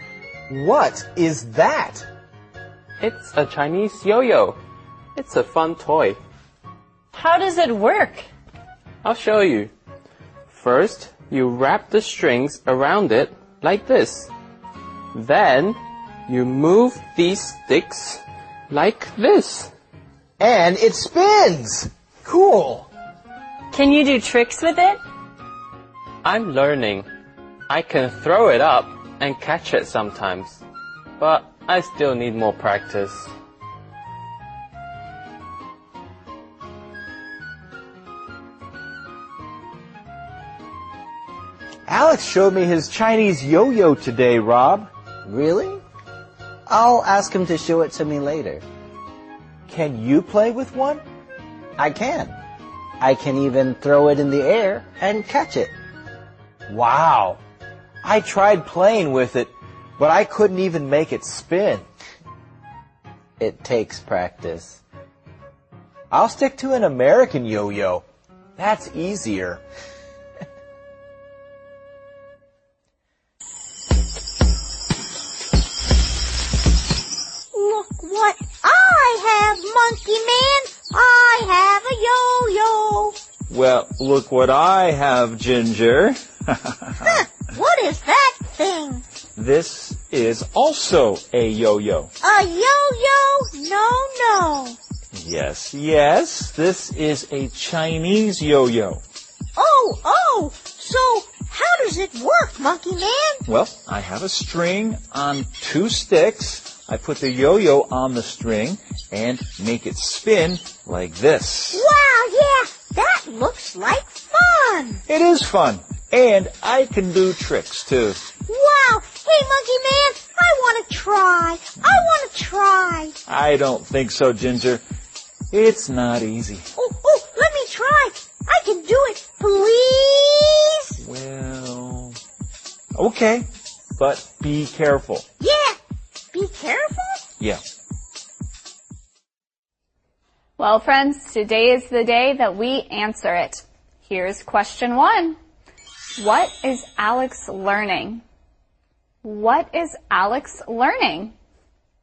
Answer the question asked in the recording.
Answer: He is learning tricks with his Chinese yo-yo.